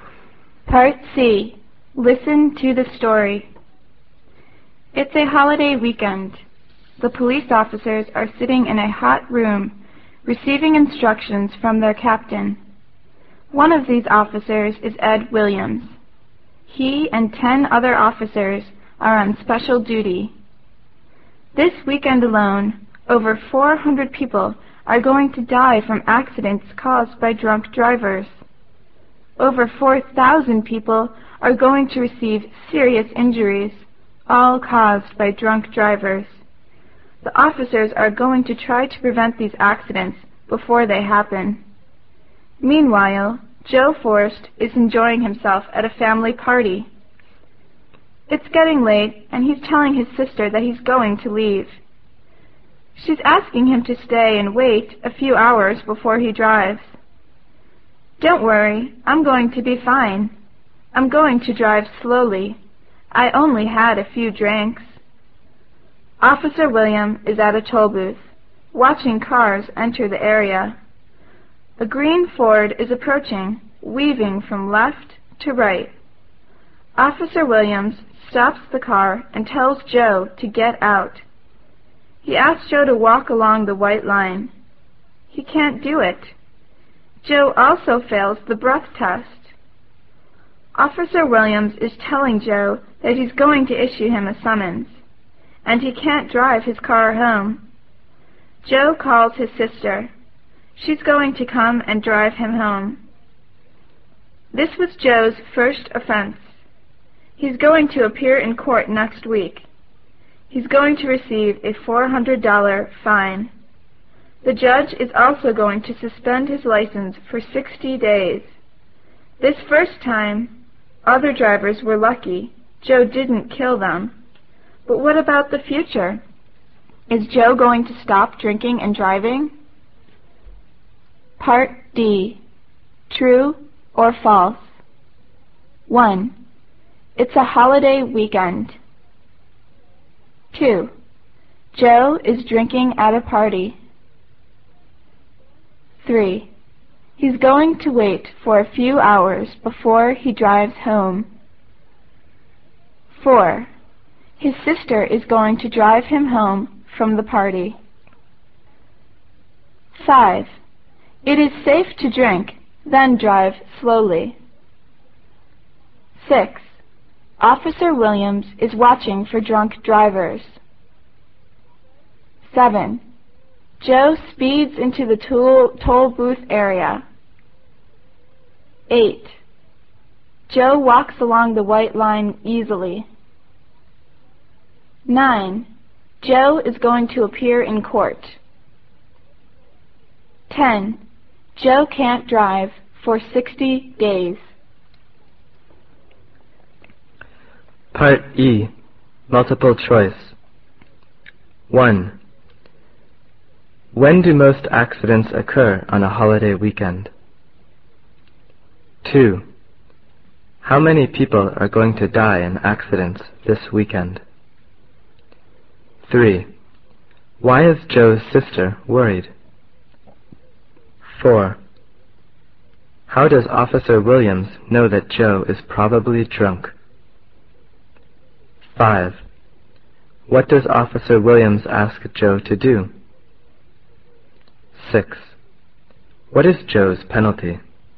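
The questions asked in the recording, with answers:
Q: It's a holiday weekend.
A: True

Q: Joe is drinking at a party.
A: True

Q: He's going to wait for a few hours before he drives home.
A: False

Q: It is safe to drink, then drive slowly.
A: False

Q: Officer Williams is watching for drunk drivers.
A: True

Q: Joe speeds into the toll booth area.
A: False

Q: Joe walks along the white line easily.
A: False

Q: Joe is going to appear in court.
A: True

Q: Joe can't drive for 60 days.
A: True

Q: How many people are going to die in accidents this weekend?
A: Over 400

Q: Why is Joe's sister worried?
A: He has been drinking and is going to drive

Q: How does Officer Williams know that Joe is probably drunk?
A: His car is weaving from left to right

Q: What does Officer Williams ask Joe to do?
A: Walk along the white line

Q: What is Joe's penalty?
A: A $400 fine and his license suspended for 60 days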